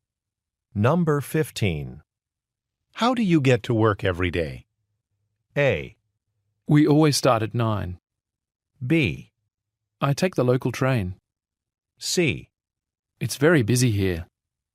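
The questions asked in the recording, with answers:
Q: How do you get to work every day?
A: B: I take the local train.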